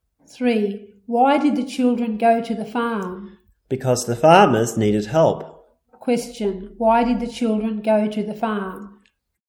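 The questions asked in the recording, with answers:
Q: Why did the children go to the farm?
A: Because the farmers needed help.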